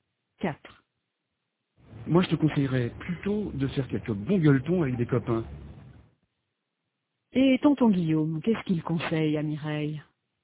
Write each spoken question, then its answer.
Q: Et tonton Guillaume, qu'est-ce qu'il conseille à Mireille?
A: Il lui conseille de faire quelques bons gueuletons avec des copains.